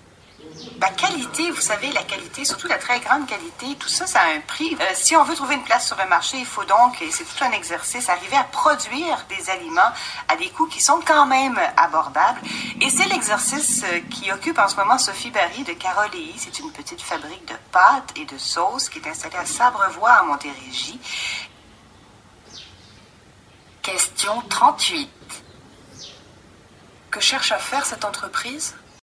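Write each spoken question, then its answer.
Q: Que cherche à faire cette entreprise ?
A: Produire des aliments de qualité à des coûts abordables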